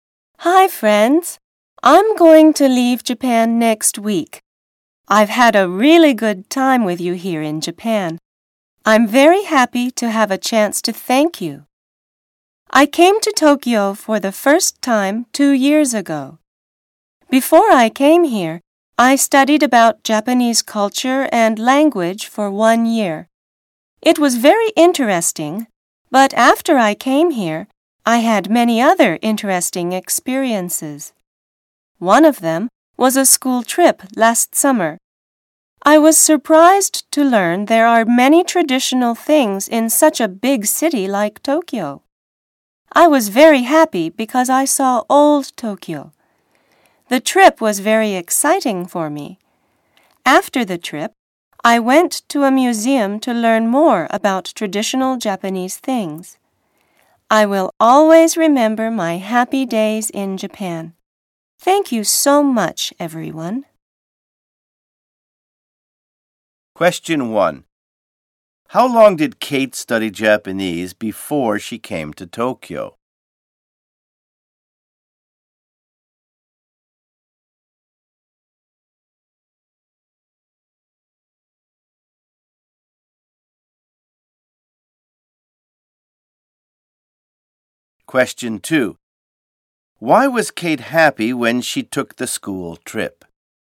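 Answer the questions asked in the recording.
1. For one year
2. Because she saw old Tokyo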